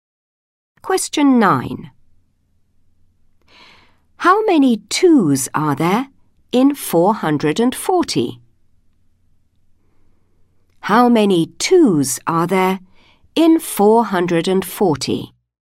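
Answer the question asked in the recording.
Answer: 220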